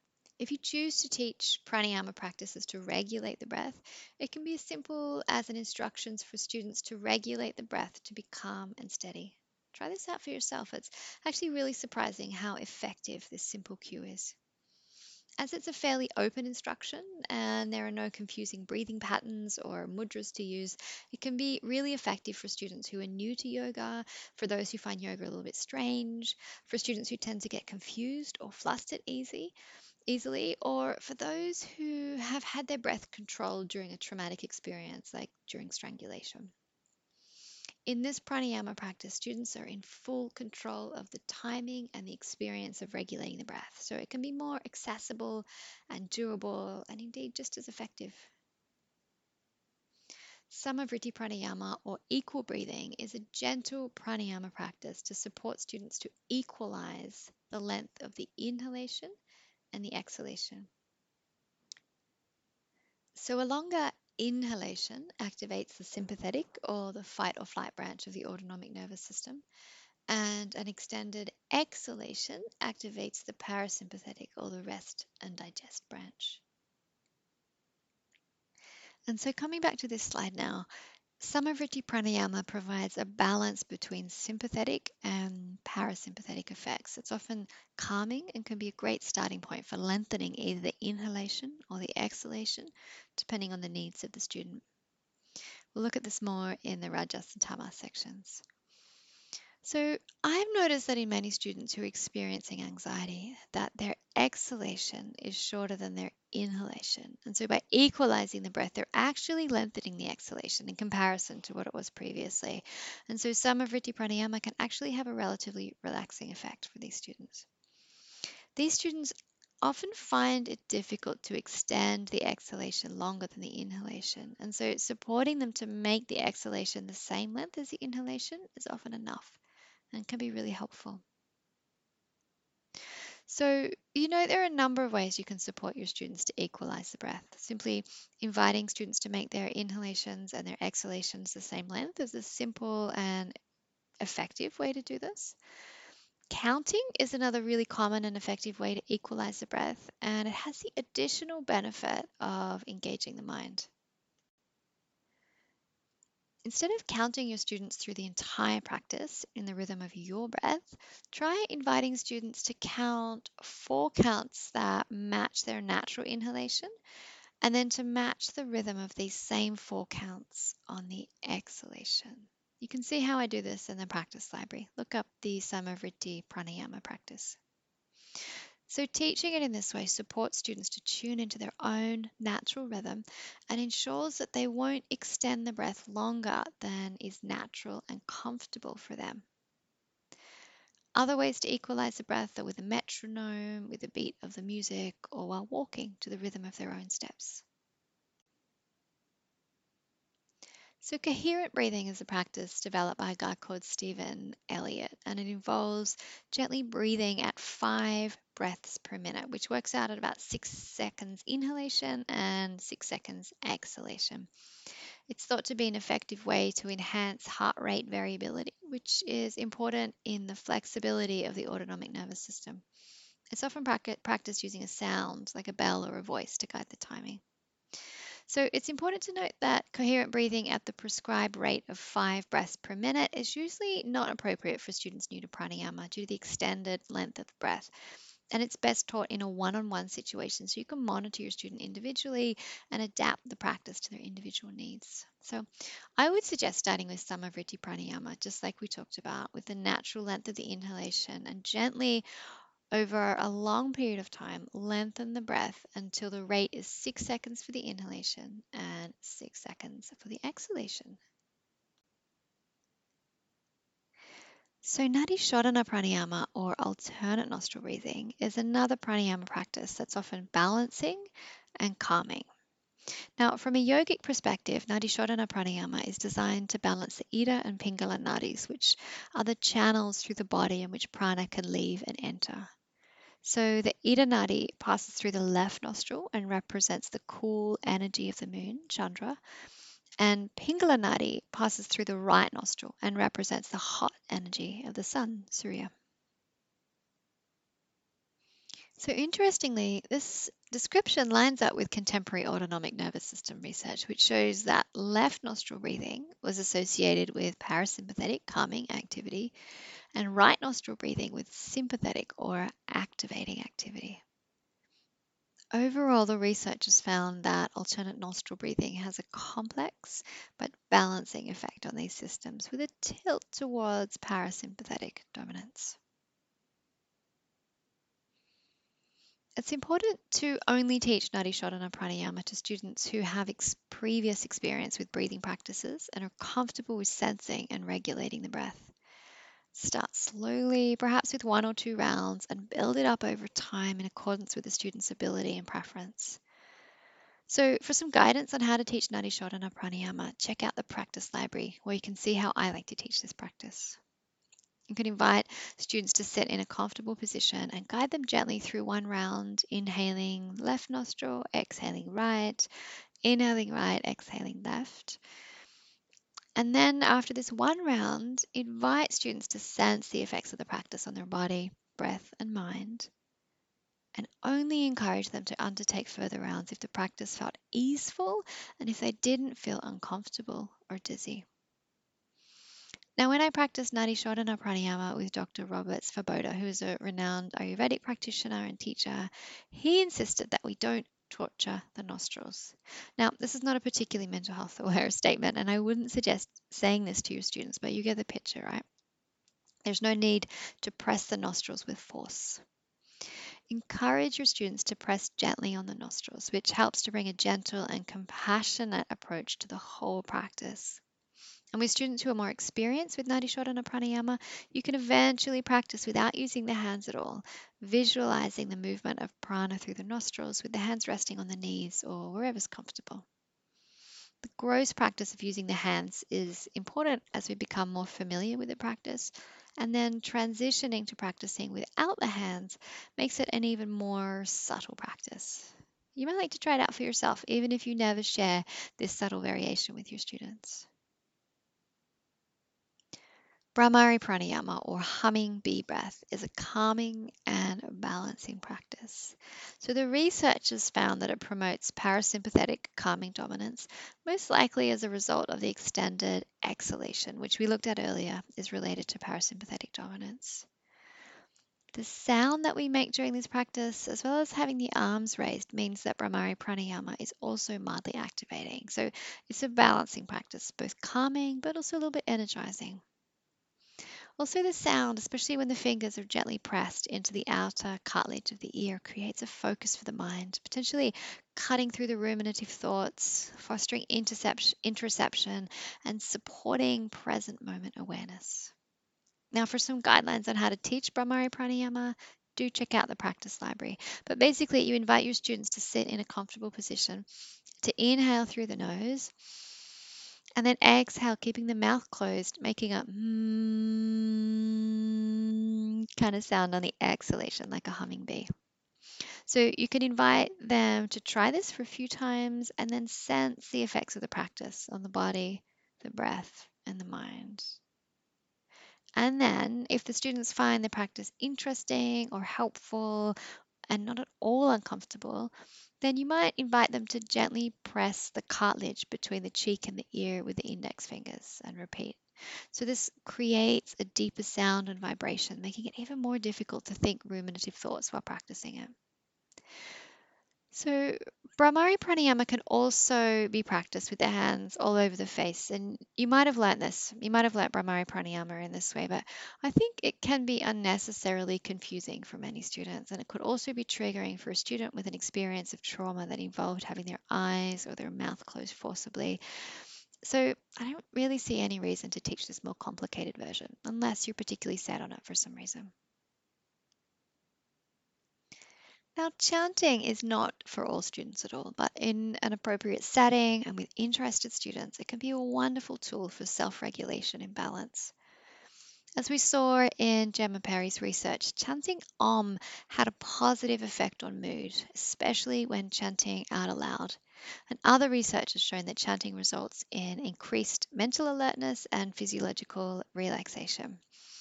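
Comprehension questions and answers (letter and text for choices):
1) When teaching prāṇāyāma, what is helpful in reducing rajas and tamas, and in doing so cultivating sattva?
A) Sensing the breath, without trying to fix or change it.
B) Regulating the breath to be calm and steady.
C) Sama vritti prāṇāyāma, coherent breathing, nāḍī sodhana prāṇāyāma, bhrāmarī prāṇāyāma and chanting.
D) All of the above.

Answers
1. D) All of the above.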